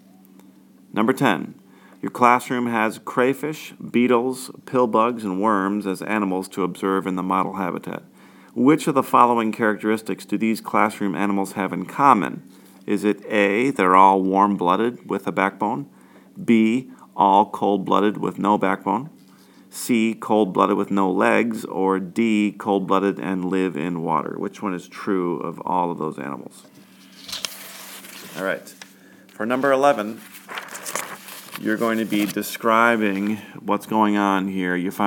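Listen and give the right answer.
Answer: B: all cold-blooded with no backbone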